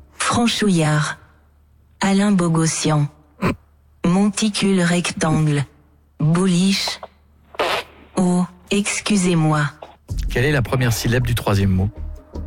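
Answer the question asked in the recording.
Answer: Mon (Monticule)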